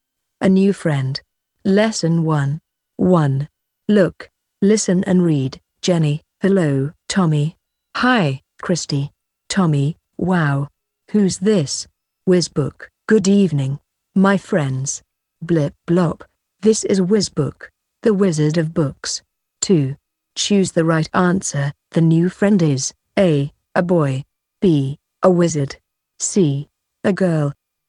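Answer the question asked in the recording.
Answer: B: A wizard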